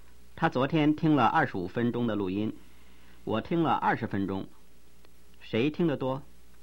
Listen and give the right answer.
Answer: 他听得多。